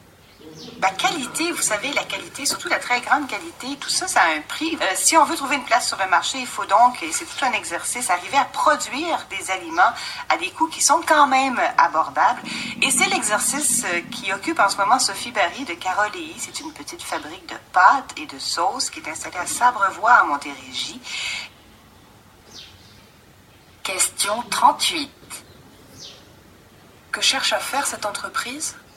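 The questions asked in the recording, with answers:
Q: Que cherche à faire cette entreprise ?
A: Produire des aliments de qualité à des prix abordables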